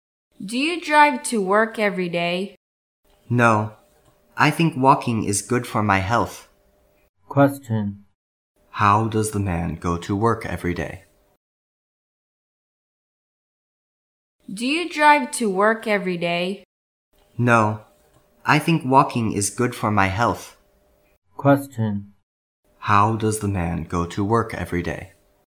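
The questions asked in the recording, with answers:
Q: How does the man go to work every day?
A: He walks.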